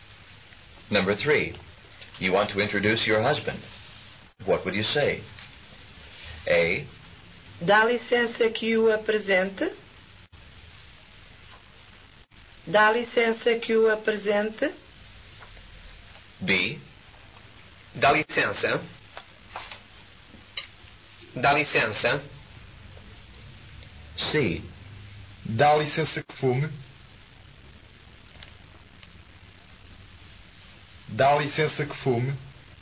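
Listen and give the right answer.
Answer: A: Dá licença que o apresente.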